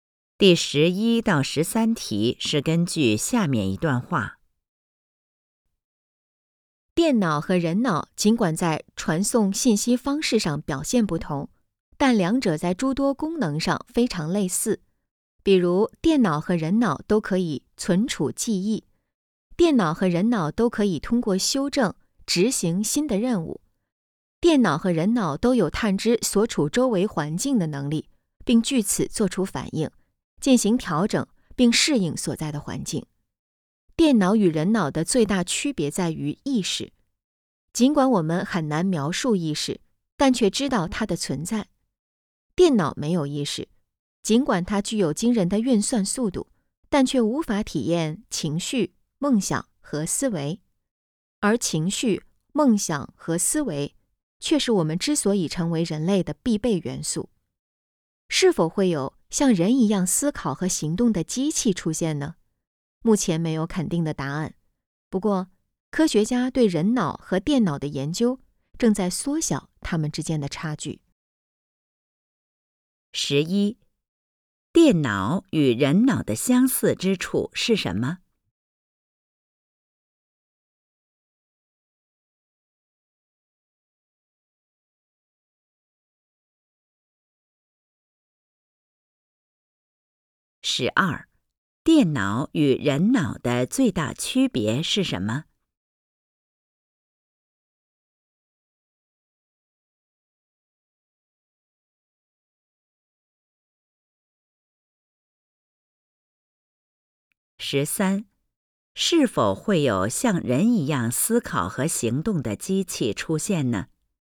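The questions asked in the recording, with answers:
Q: 电脑与人脑的相似之处是什么?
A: 都可以存储记忆,都可以通过修正执行新的任务,都能探知周围环境并做出反应、适应环境

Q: 电脑与人脑的最大区别是什么?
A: 意识

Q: 是否会有像人一样思考和行动的机器出现呢?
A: 目前没有肯定的答案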